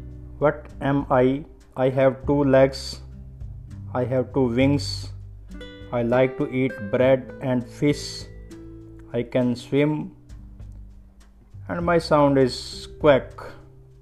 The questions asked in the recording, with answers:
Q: What am I?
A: I am a duck.